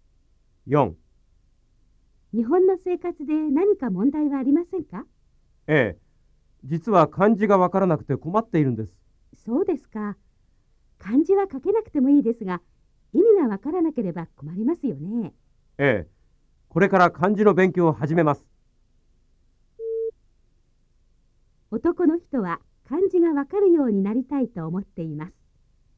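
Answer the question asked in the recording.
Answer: ○(正しい)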